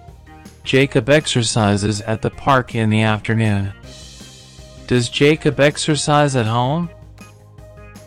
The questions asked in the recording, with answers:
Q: Does Jacob exercise at home?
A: No, he doesn't. He doesn't exercise at home.